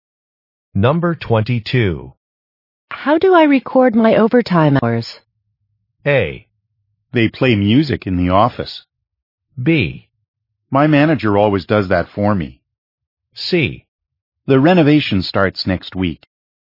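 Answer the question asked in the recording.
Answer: B: My manager always does that for me.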